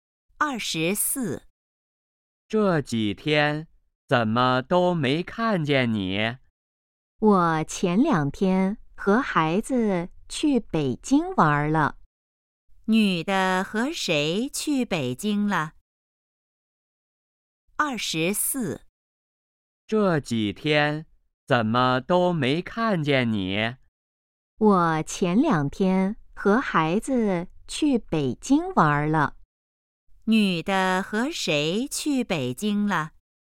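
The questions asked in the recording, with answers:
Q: 女的和谁去北京了?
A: 和孩子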